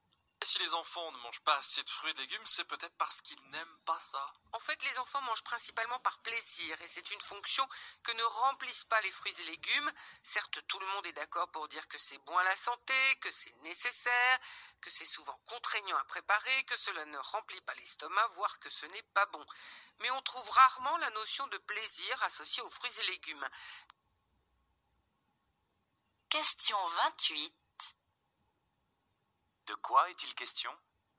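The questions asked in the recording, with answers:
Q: De quoi est-il question ?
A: Des enfants qui ne mangent pas assez de fruits et légumes parce qu'ils n'y associent pas de plaisir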